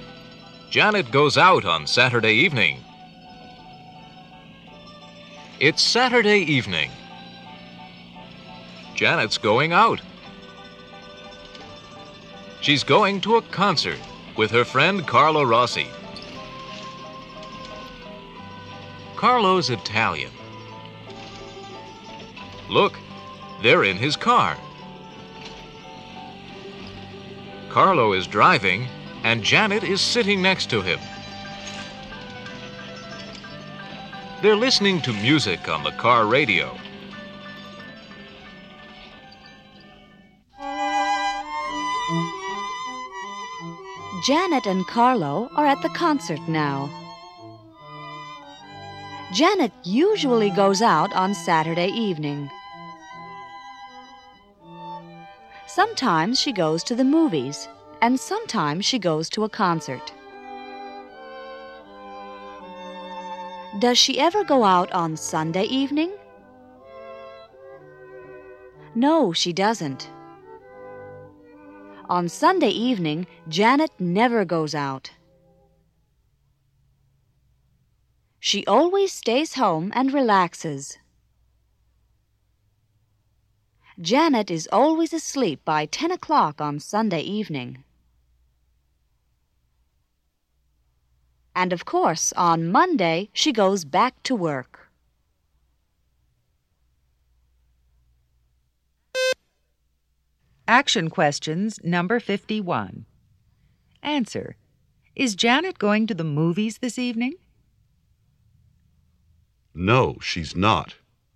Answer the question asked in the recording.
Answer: No, she's not.